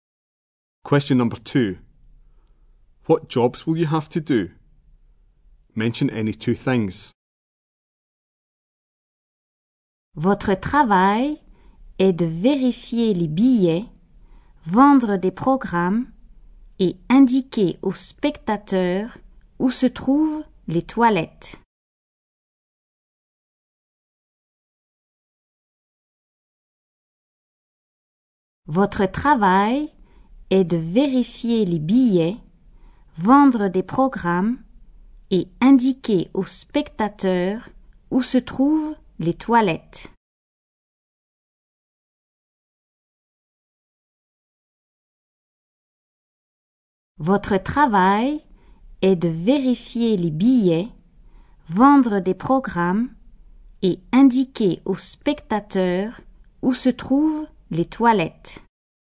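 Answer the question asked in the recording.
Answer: Check tickets, sell programmes, show spectators where the toilets are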